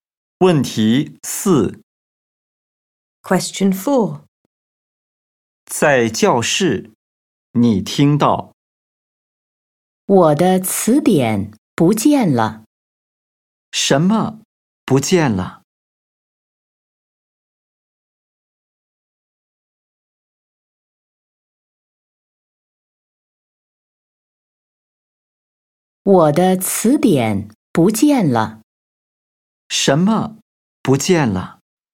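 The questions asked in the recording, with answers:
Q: 什么不见了?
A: 我的词典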